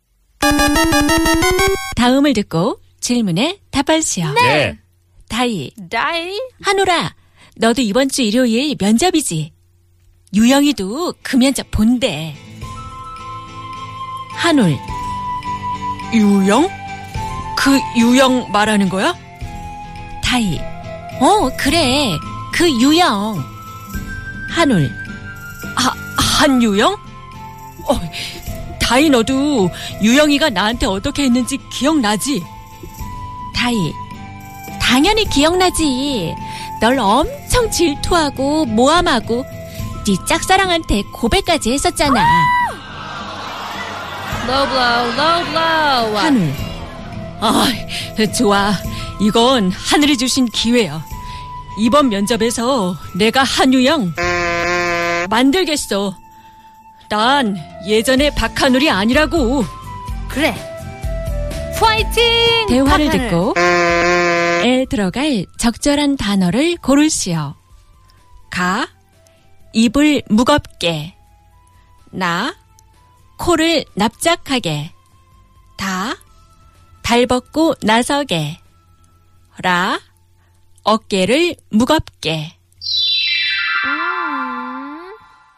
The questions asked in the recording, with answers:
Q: 대화를 듣고 에 들어갈 적절한 단어를 고르시오.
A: But now works the best.